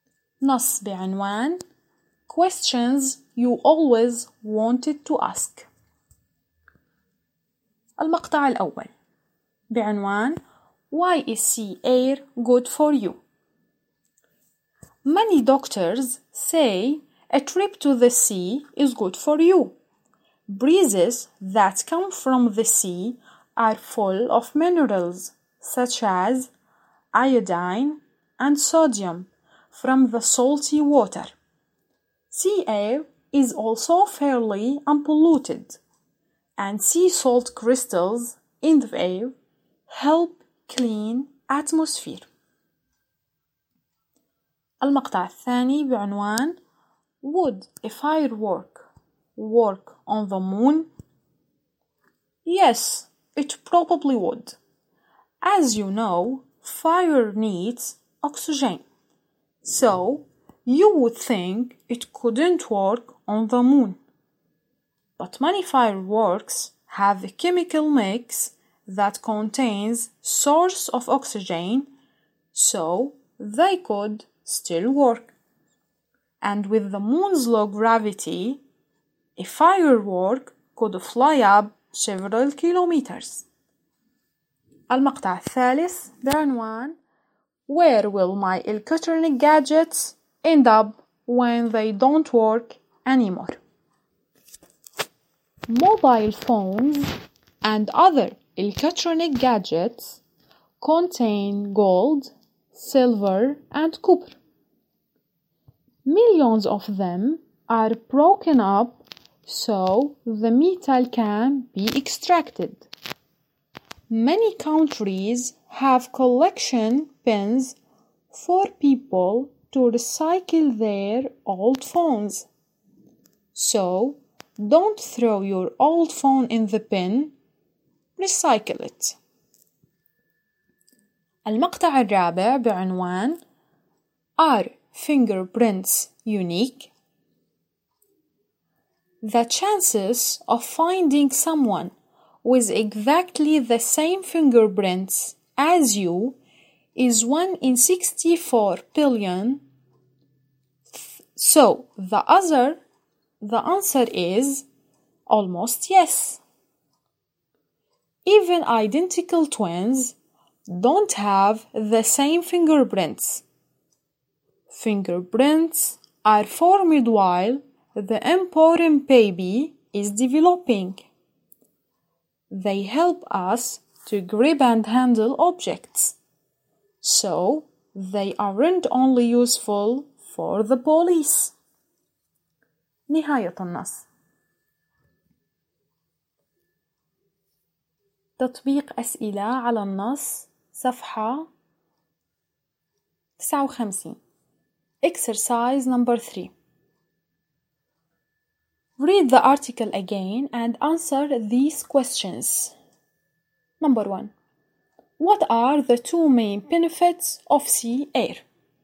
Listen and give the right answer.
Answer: Sea air is full of minerals such as iodine and sodium from the salty water. The sea air is also fairly unpolluted.